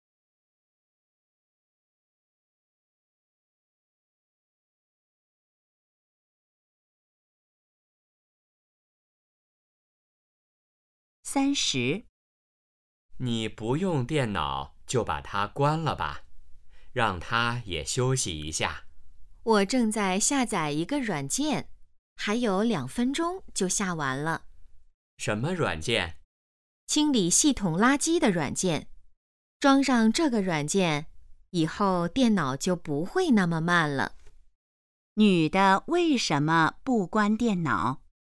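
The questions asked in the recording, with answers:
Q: 女的为什么不关电脑?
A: 正在下载软件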